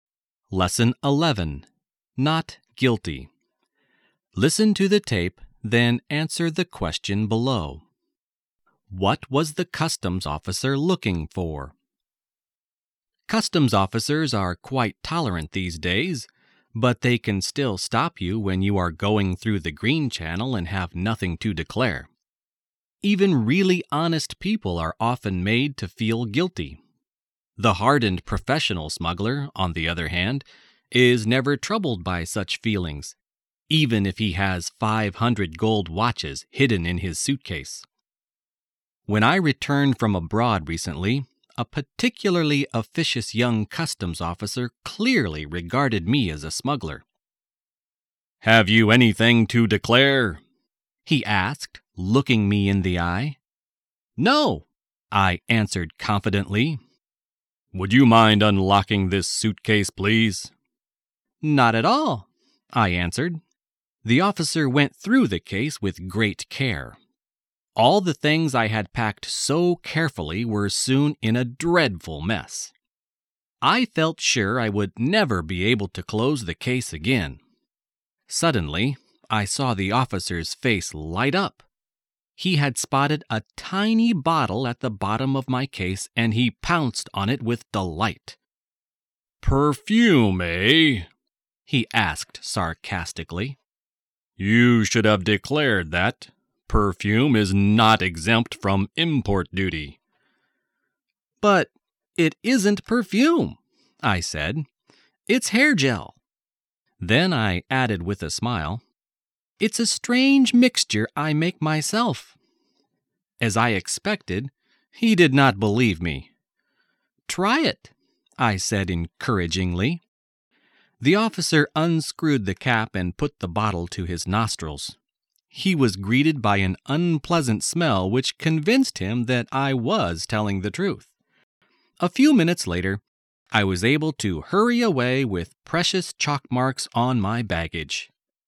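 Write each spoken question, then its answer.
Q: What was the customs officer looking for?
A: Smuggled goods (he suspected the bottle was perfume that should have been declared)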